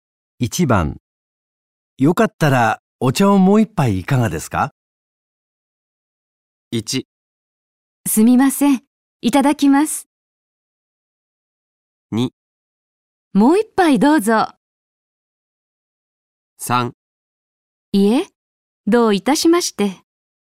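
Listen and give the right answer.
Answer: 1: すみません、いただきます。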